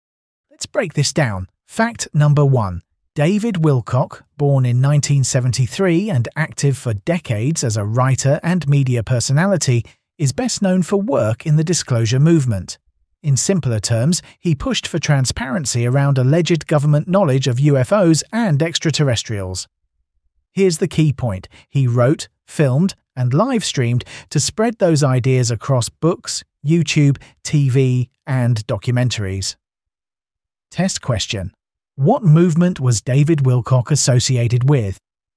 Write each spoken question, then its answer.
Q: What movement was David Wilcock associated with?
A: Correct answer, the disclosure movement.